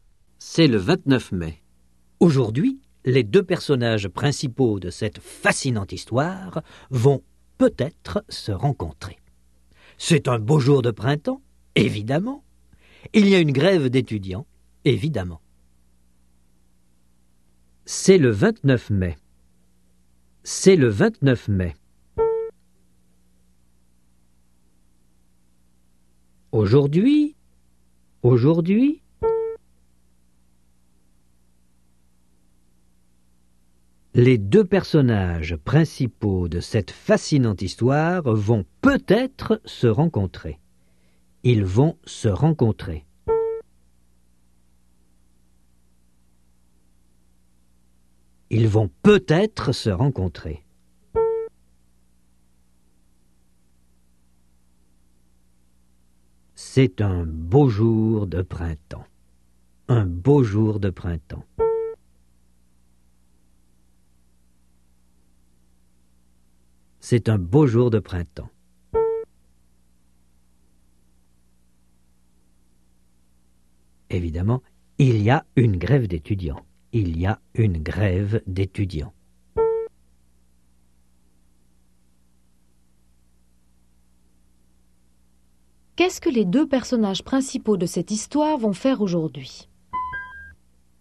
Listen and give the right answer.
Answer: Ils vont peut-être se rencontrer.